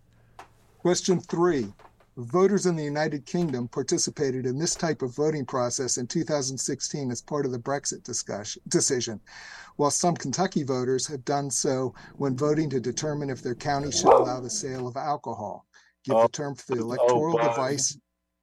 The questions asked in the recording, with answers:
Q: Give the term for the electoral device.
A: It's a referendum.